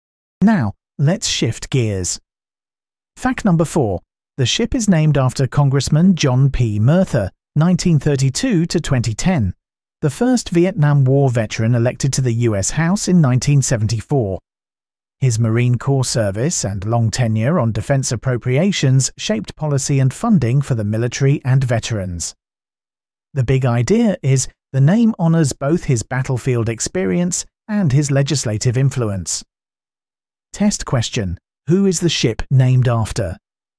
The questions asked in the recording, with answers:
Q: Who is the ship named after?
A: Correct answer. John P. Murtha.